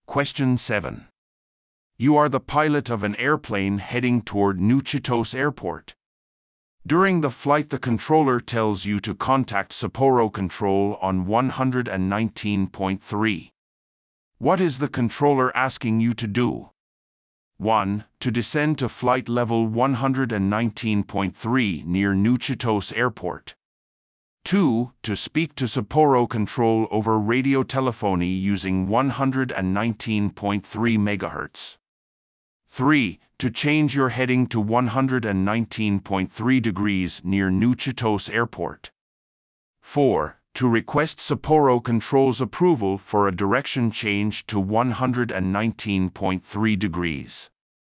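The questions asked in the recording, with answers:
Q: What is the controller asking you to do?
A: 2: To speak to Sapporo Control over radio telephony using 119.3 MHz.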